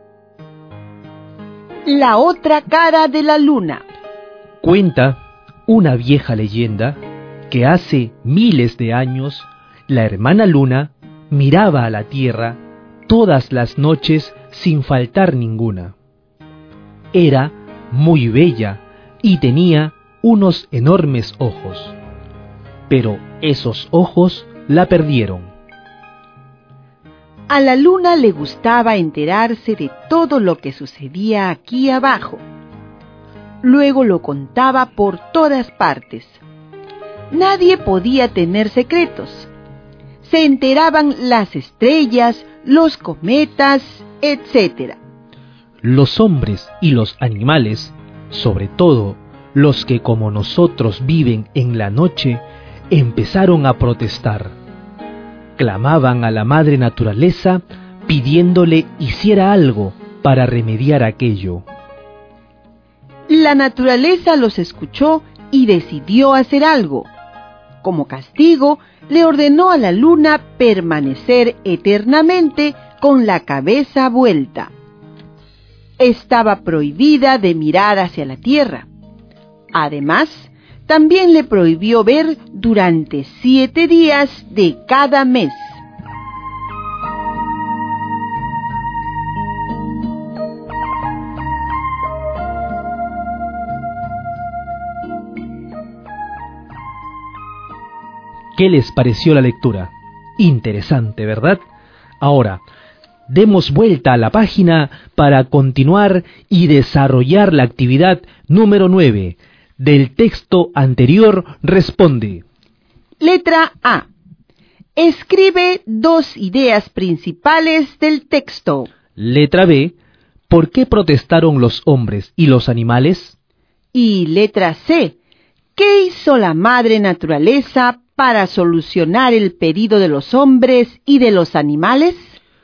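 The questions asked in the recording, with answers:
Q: ¿Por qué protestaron los hombres y los animales?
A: Porque la luna se enteraba de todo lo que pasaba en la tierra y lo contaba por todas partes; nadie podía tener secretos.

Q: ¿Qué hizo la madre naturaleza para solucionar el pedido de los hombres y de los animales?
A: Castigó a la luna: le ordenó tener la cabeza vuelta para siempre, le prohibió mirar hacia la tierra y no ver durante 7 días de cada mes.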